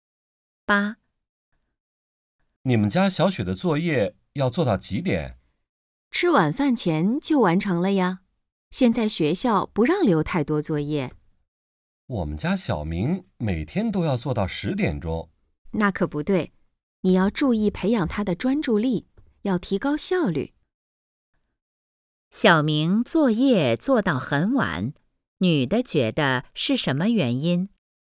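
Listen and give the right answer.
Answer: 专注力不够,效率不高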